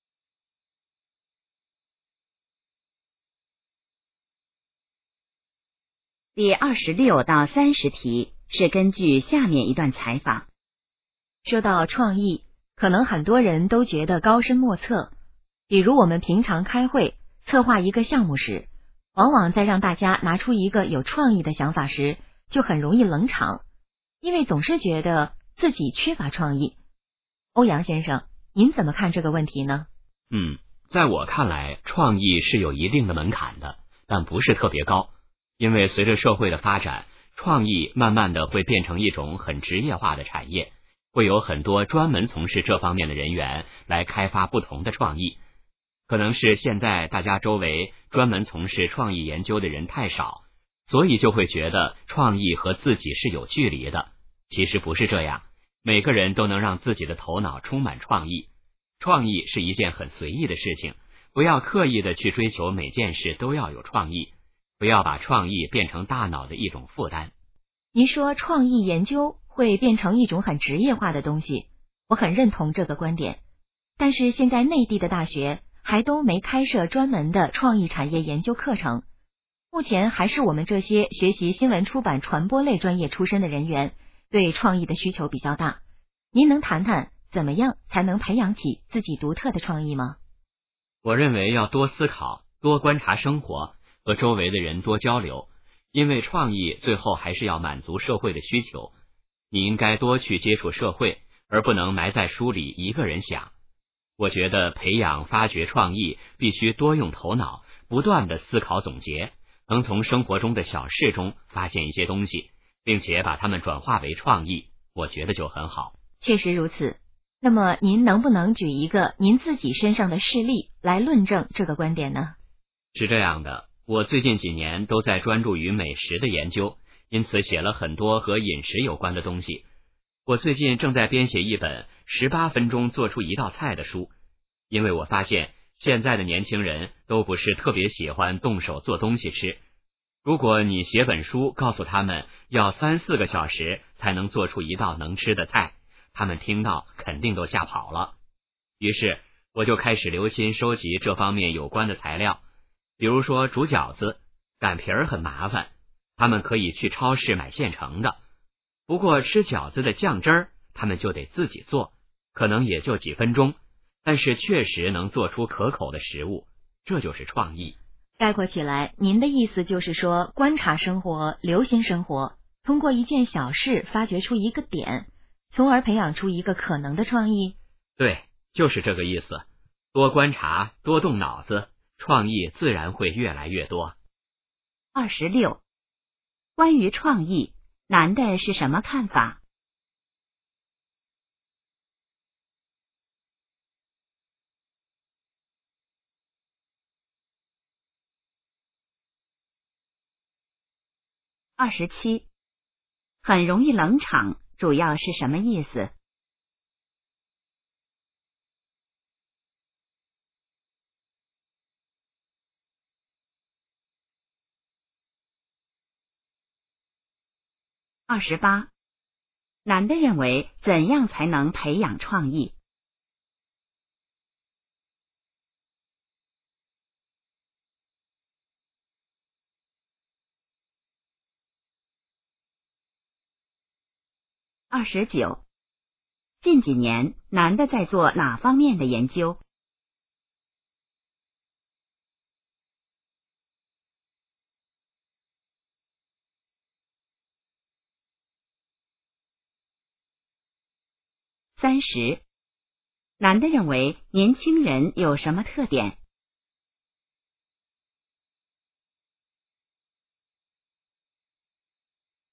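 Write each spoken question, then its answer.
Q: 关于创意,男的是什么看法?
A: 创意有门槛但不高,每个人都能有创意

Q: 很容易冷场,主要是什么意思?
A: 大家都不说话,场面冷清

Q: 男的认为怎样才能培养创意?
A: 多思考,多观察生活,多和人交流

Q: 近几年,男的在做哪方面的研究?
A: 美食

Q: 男的认为年轻人有什么特点?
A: 不喜欢动手做东西吃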